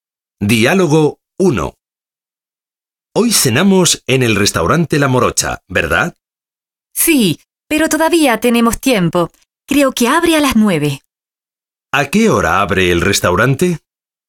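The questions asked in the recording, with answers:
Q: ¿A qué hora abre el restaurante?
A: A las 9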